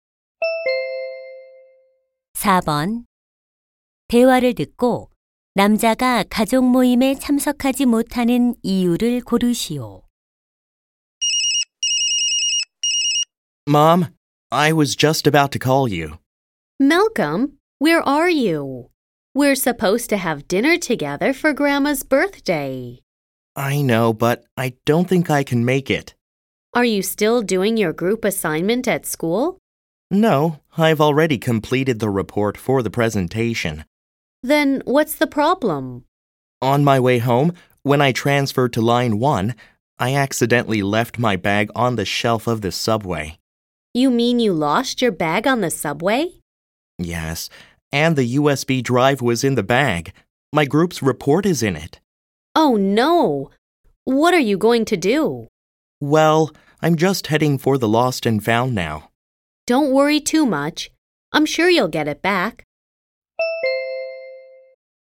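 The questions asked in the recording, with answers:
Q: 대화를 듣고 남자가 가족 모임에 참석하지 못하는 이유를 고르시오.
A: 지하철에 두고 내린 가방을 찾으러 분실물 센터에 가야 해서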